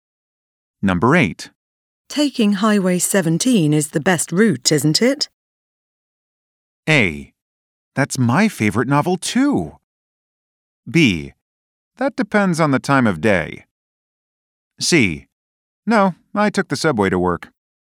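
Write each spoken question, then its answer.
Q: Taking Highway 17 is the best route, isn't it?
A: B: That depends on the time of day.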